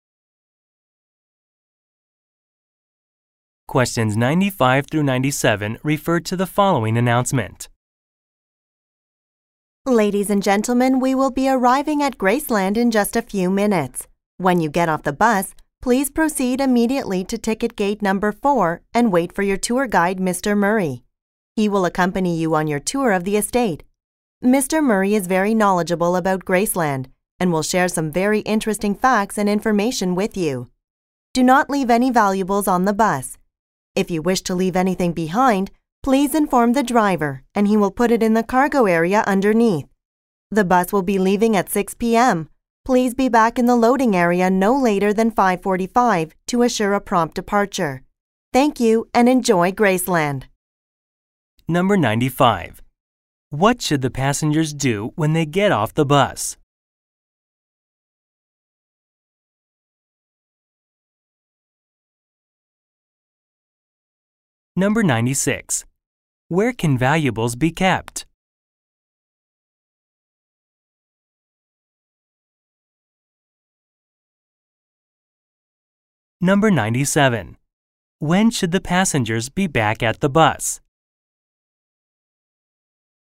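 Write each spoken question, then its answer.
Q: What should the passengers do when they get off the bus?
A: Go to ticket gate 4 and wait for the guide

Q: Where can valuables be kept?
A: In the cargo area under the bus

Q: When should the passengers be back at the bus?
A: By 5:45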